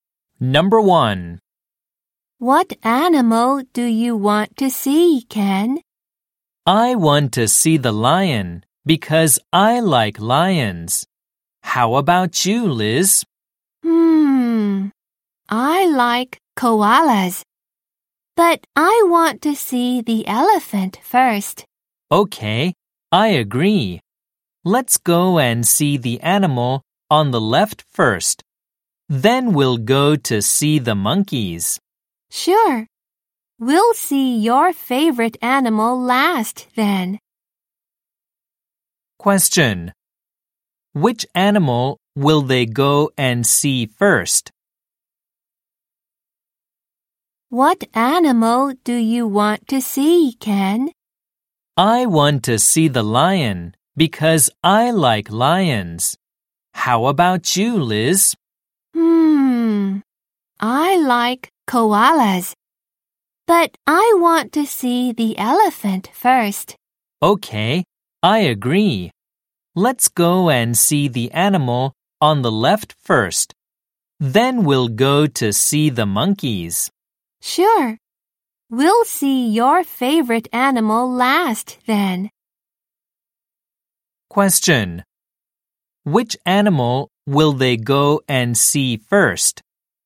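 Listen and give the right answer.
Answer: The elephant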